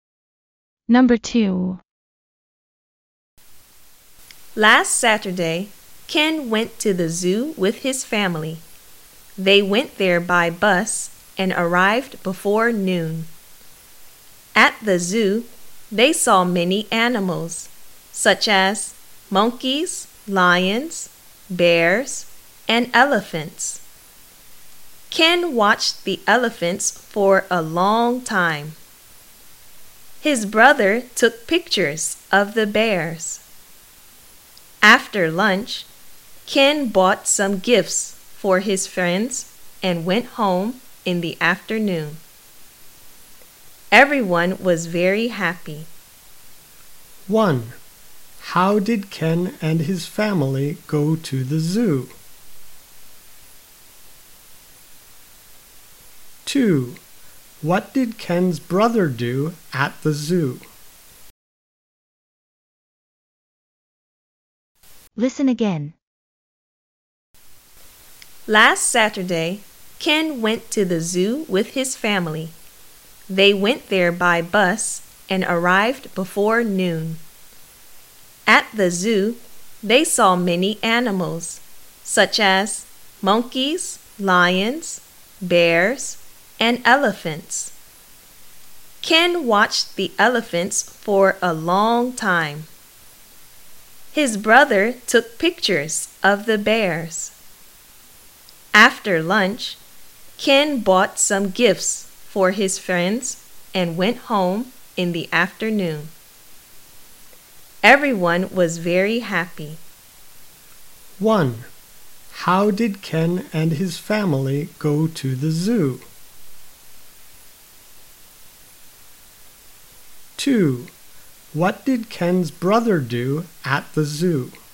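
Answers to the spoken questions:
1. By bus
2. He took pictures of the bears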